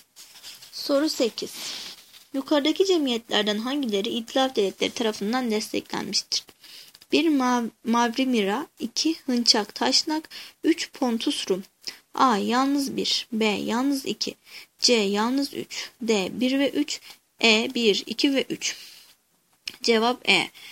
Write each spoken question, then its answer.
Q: Yukarıdaki cemiyetlerden hangileri İtilaf Devletleri tarafından desteklenmiştir?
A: Cevap E.